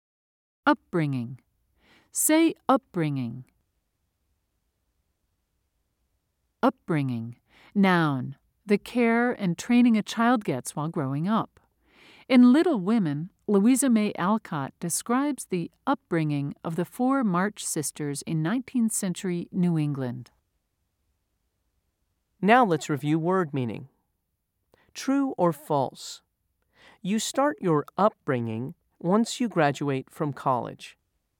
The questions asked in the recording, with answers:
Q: True or false? You start your upbringing once you graduate from college.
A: If you said false, you're correct.